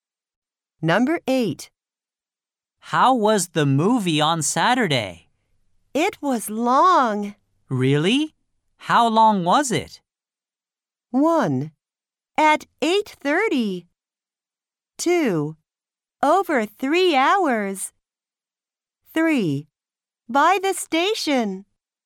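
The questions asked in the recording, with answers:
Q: Really? How long was it?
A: 2: Over 3 hours.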